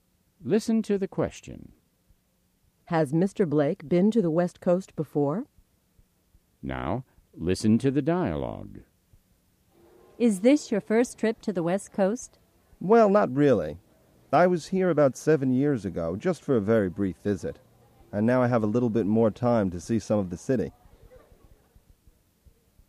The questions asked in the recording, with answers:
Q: Has Mr. Blake been to the West Coast before?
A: Yes, he has. He came to San Francisco 7 years ago.